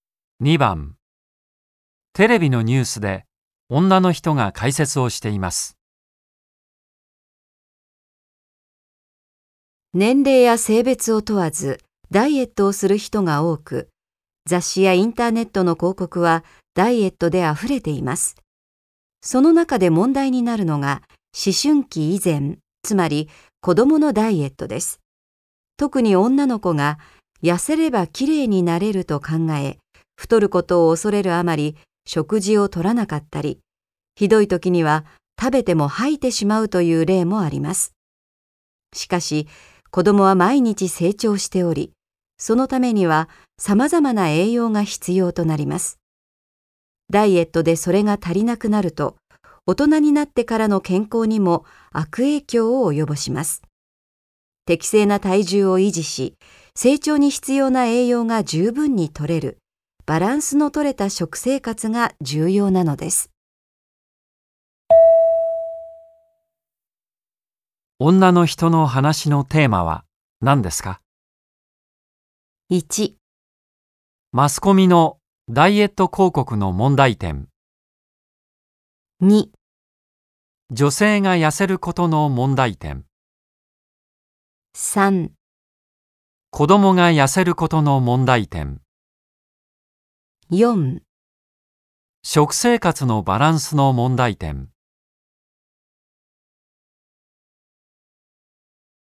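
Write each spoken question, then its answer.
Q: 女の人の話のテーマは何ですか?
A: 3: 子供が痩せることの問題点。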